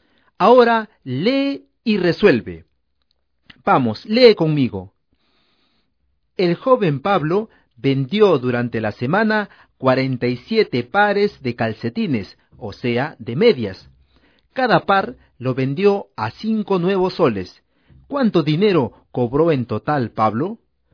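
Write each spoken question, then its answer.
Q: ¿Cuánto dinero cobró en total Pablo?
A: 235 nuevos soles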